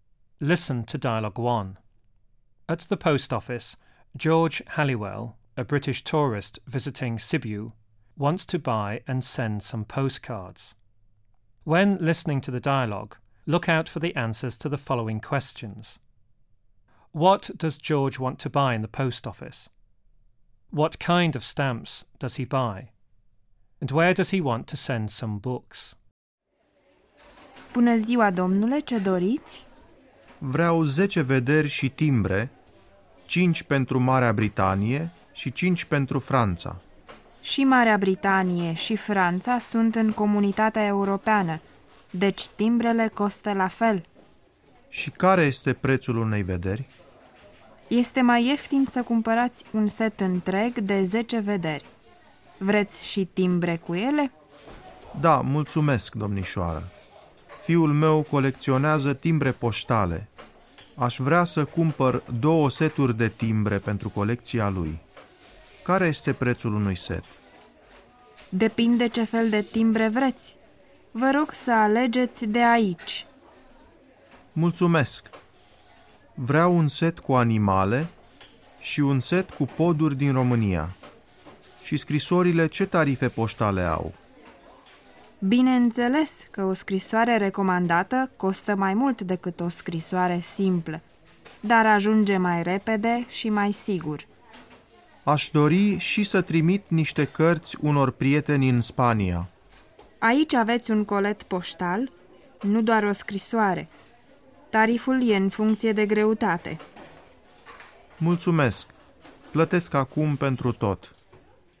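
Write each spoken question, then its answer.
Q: What does George want to buy in the post office?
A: 10 postcards and stamps

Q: What kind of stamps does he buy?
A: A set with animals and a set with bridges from Romania

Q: And where does he want to send some books?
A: To friends in Spain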